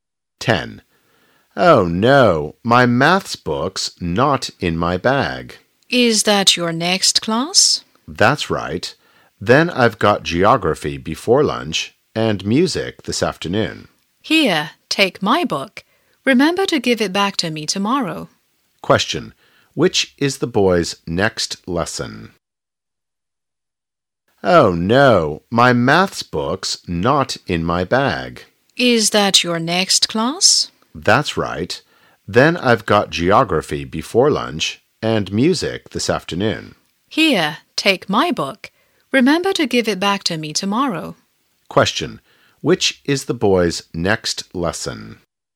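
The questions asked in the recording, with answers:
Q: which is the boy's next lesson?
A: Maths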